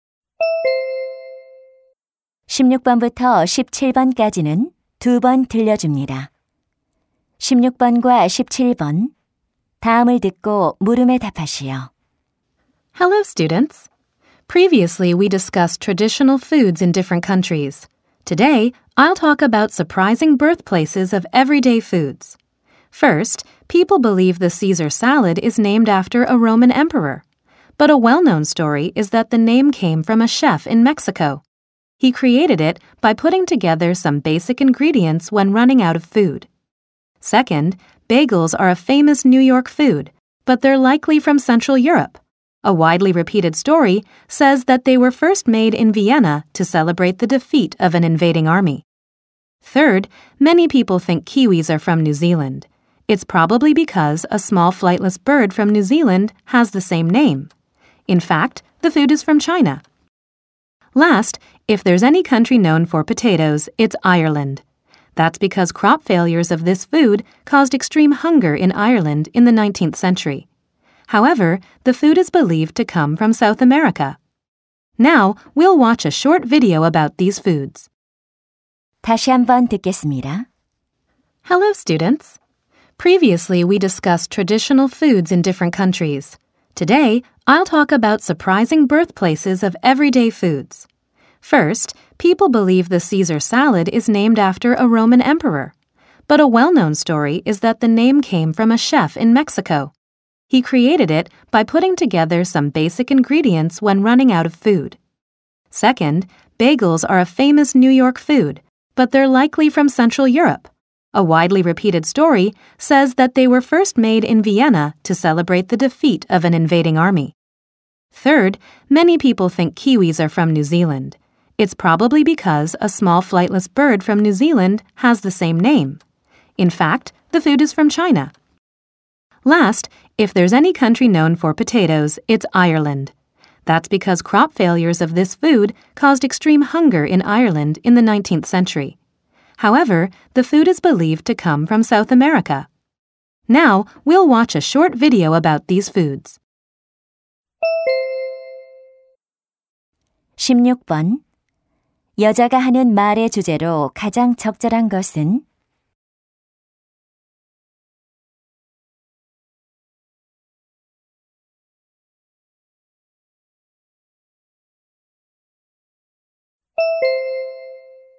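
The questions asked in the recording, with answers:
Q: 여자가 하는 말의 주제로 가장 적절한 것은?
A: 일상 음식들의 의외의 원산지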